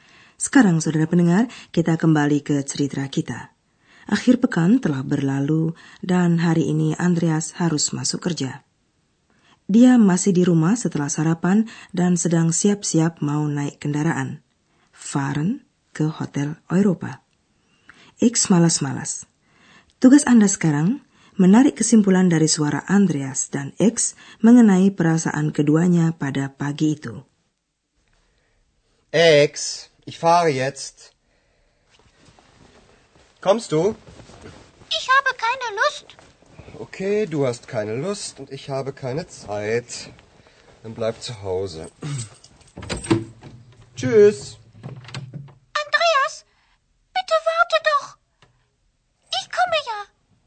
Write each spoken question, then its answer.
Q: Tugas Anda sekarang menarik kesimpulan dari suara Andreas dan X mengenai perasaan keduanya pada pagi itu.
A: X kurang semangat, dan Andreas sedang tidak sabaran.